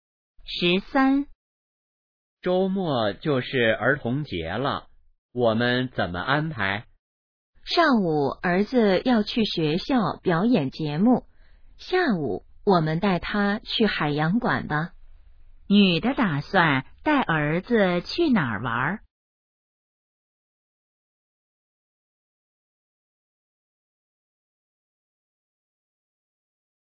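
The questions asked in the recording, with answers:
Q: 女的打算带儿子去哪儿玩?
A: 海洋馆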